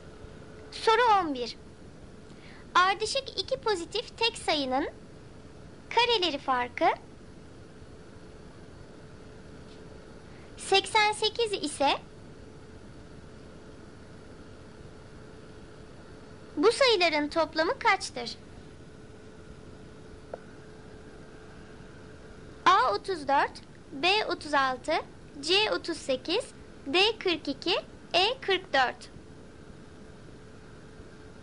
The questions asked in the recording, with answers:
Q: bu sayıların toplamı kaçtır?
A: Doğru cevap E 44.